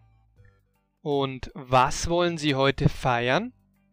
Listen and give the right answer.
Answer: Den Geburtstag von Martina.